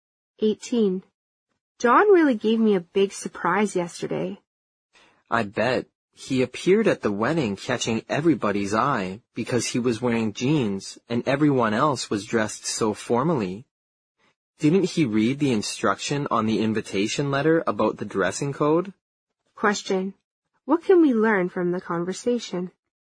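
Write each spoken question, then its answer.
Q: What can we learn from the conversation?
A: John wore jeans to the wedding when everyone else dressed formally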